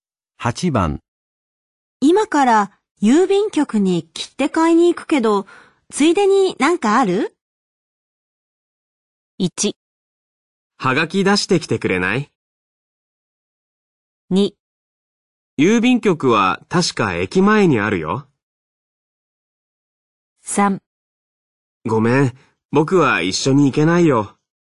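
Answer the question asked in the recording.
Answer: 1: はがき出してきてくれない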